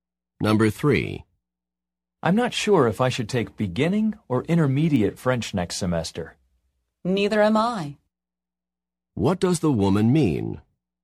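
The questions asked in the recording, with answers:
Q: What does the woman mean?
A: She is also unsure which French course to take.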